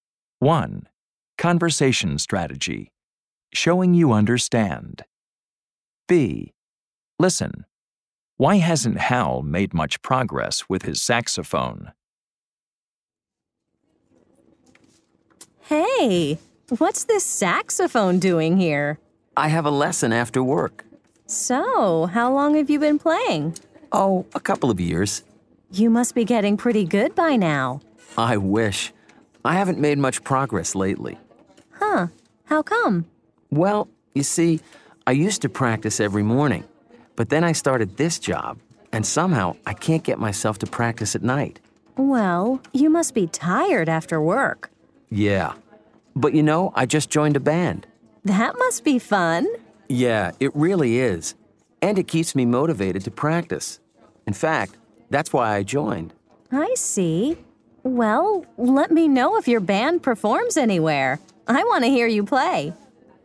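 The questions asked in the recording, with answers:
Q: Why hasn't Hal made much progress with his saxophone?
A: He started a job and can't get himself to practice at night.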